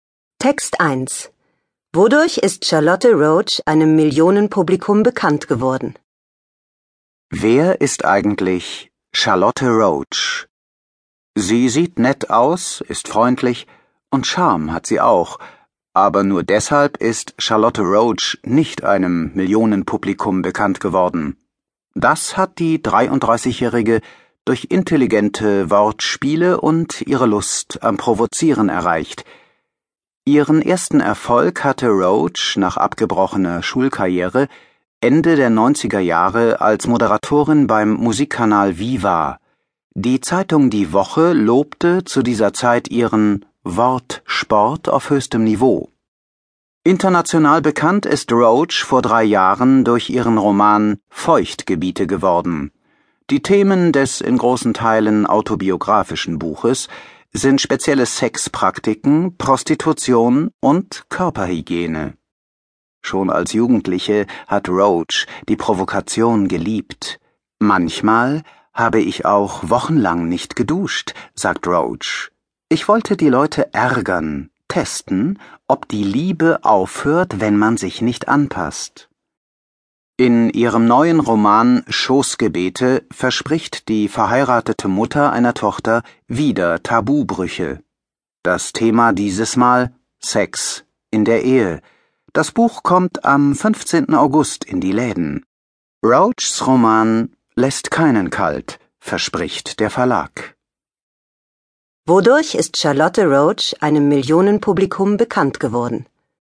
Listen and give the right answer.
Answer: durch intelligente Wortspiele und ihre Lust am Provozieren.